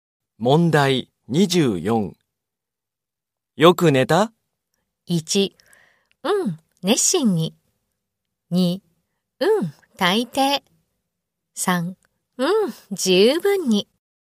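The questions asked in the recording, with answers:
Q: よく寝た?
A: 1: うん、十分に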